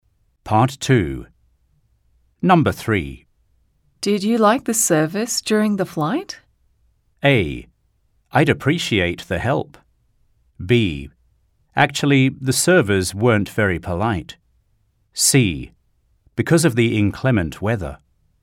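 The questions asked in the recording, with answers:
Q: Did you like the service during the flight?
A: B: Actually, the servers weren't very polite.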